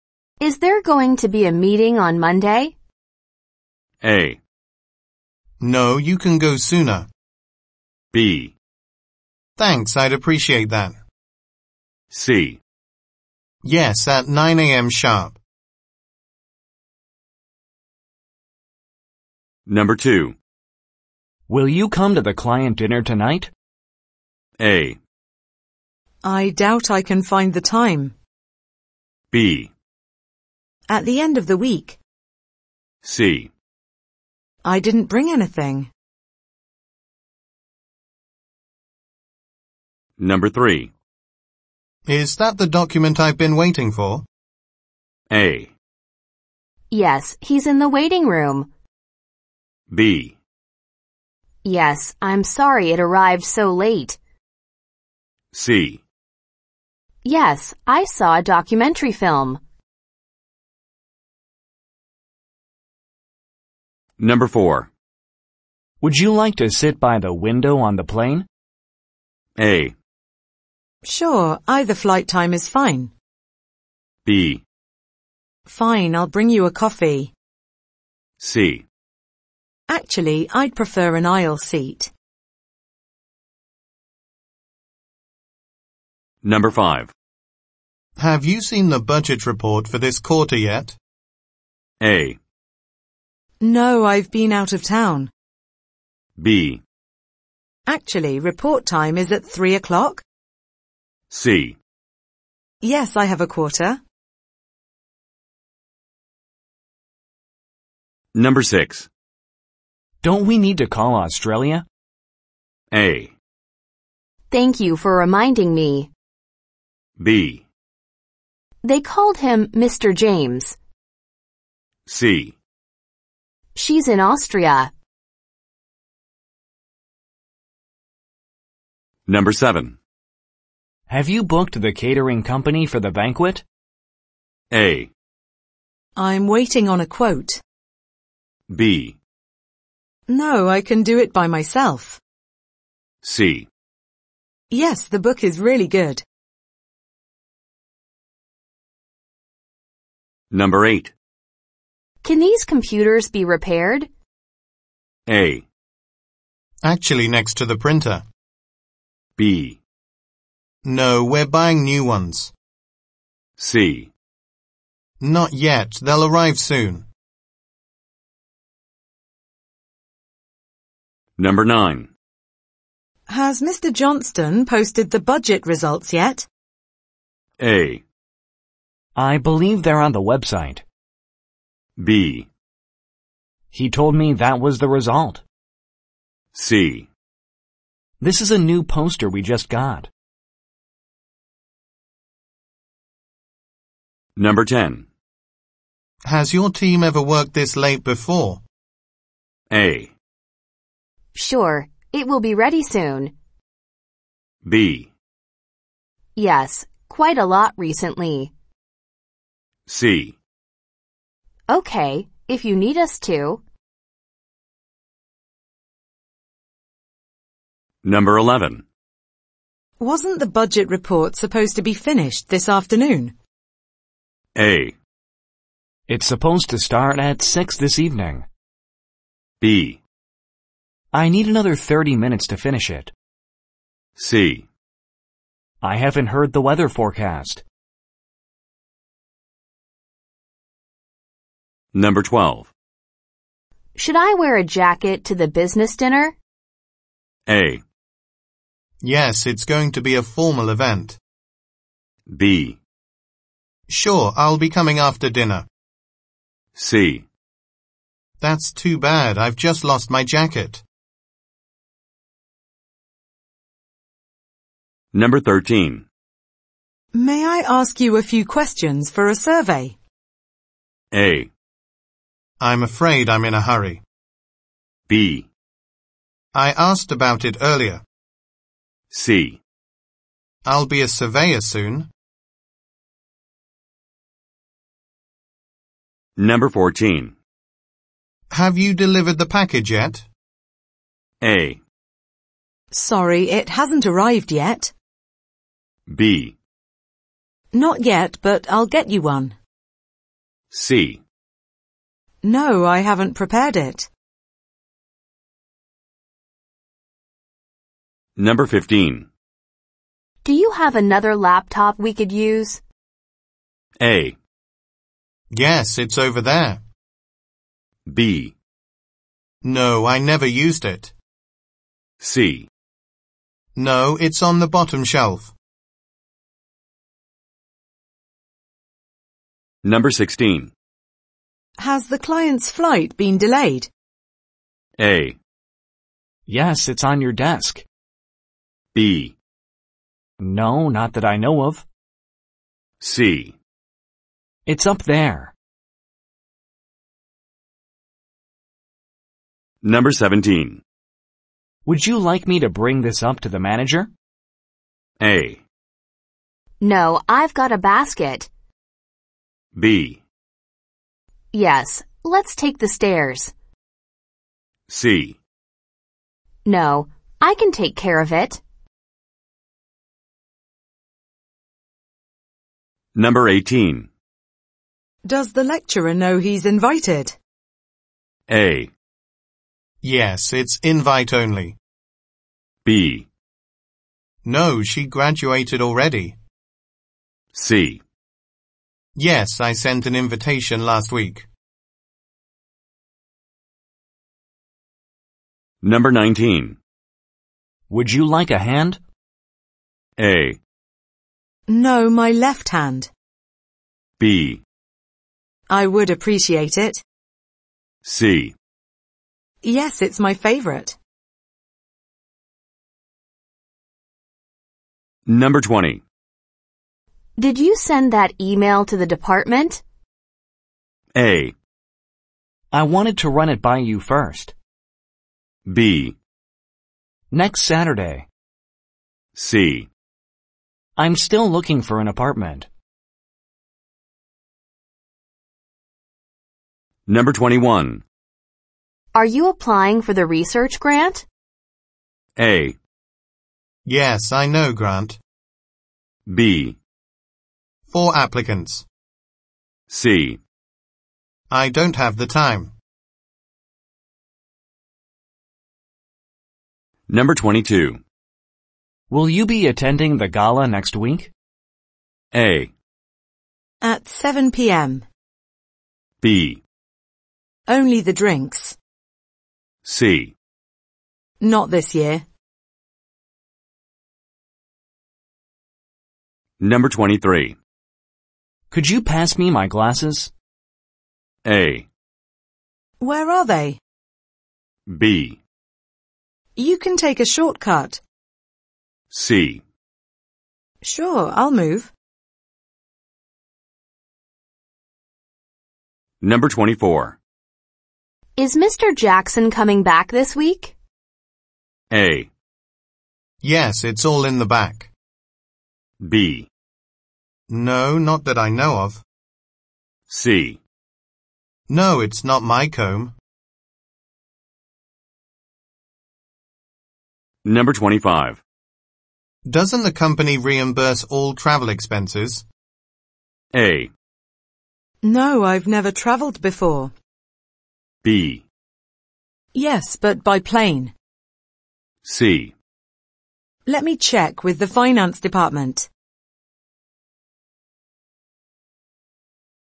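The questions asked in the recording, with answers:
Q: Is there going to be a meeting on Monday?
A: C: Yes, at 9 a.m. sharp.

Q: Will you come to the client dinner tonight?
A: A: I doubt I can find the time.

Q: Is that the document I've been waiting for?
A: B: Yes, I'm sorry it arrived so late.

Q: Would you like to sit by the window on the plane?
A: C: Actually, I'd prefer an aisle seat.

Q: Have you seen the budget report for this quarter yet?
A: A: No, I've been out of town.

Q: Don't we need to call Australia?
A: A: Thank you for reminding me.

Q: Have you booked the catering company for the banquet?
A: A: I'm waiting on a quote.

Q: Can these computers be repaired?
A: B: No, we're buying new ones.

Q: Has Mr. Johnston posted the budget results yet?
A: A: I believe they're on the website.

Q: Has your team ever worked this late before?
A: B: Yes, quite a lot recently.

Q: Wasn't the budget report supposed to be finished this afternoon?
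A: B: I need another 30 minutes to finish it.

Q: Should I wear a jacket to the business dinner?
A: A: Yes, it's going to be a formal event.

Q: May I ask you a few questions for a survey?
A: A: I'm afraid I'm in a hurry.

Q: Do you have another laptop we could use?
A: A: Yes, it's over there.

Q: Has the client's flight been delayed?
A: B: No, not that I know of.

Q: Would you like me to bring this up to the manager?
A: C: No, I can take care of it.

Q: Does the lecturer know he's invited?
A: C: Yes, I sent an invitation last week.

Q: Would you like a hand?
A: B: I would appreciate it.

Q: Did you send that email to the department?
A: A: I wanted to run it by you first.

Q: Are you applying for the research grant?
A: C: I don't have the time.

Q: Will you be attending the gala next week?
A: C: Not this year.

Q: Could you pass me my glasses?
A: A: Where are they?

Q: Is Mr. Jackson coming back this week?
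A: B: No, not that I know of.

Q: Doesn't the company reimburse all travel expenses?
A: C: Let me check with the finance department.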